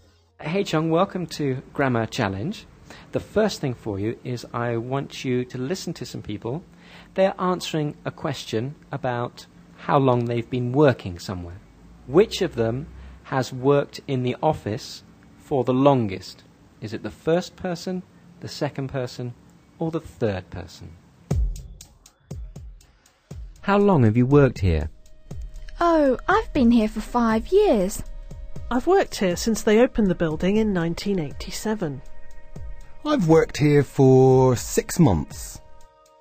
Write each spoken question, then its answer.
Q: Which of them has worked in the office for the longest?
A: The second person, yes. Yes, they worked there since 1987.